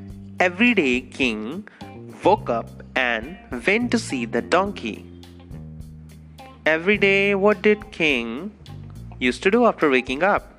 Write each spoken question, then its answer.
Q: Every day, what did king used to do after waking up?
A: Every day, the king went to see the donkey after waking up.